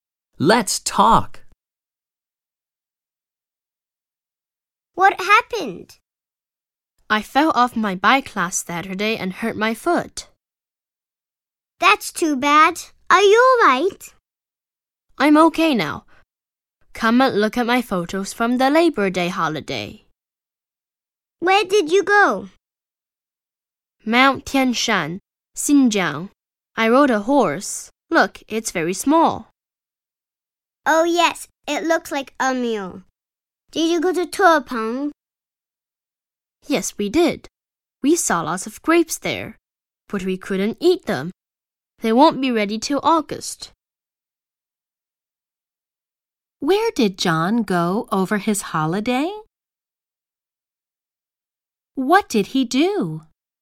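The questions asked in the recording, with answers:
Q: Where did John go over his holiday?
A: Mount Tianshan, Xinjiang, and Turpan

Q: What did he do?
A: He rode a horse and saw lots of grapes.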